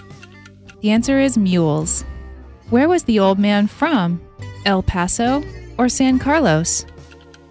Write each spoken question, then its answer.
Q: Where was the old man from?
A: He was from San Carlos.